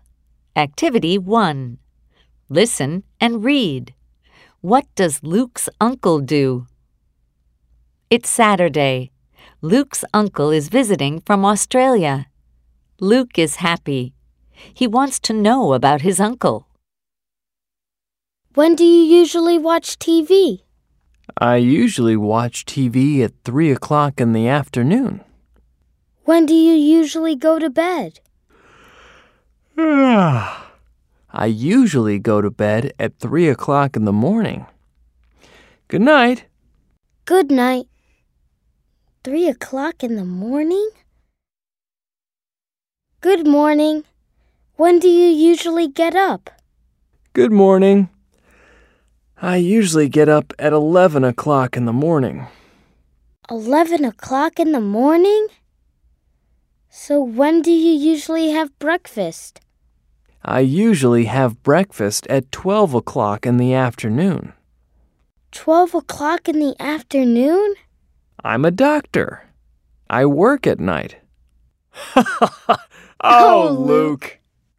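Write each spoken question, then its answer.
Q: What does Luke's uncle do?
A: He's a doctor.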